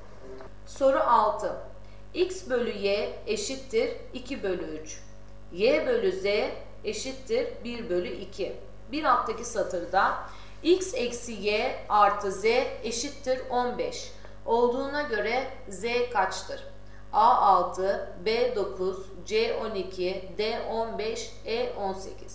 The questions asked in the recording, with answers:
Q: Bir alttaki satırda X eksi Y artı Z eşittir 15 olduğuna göre Z kaçtır?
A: Doğru cevap E 18.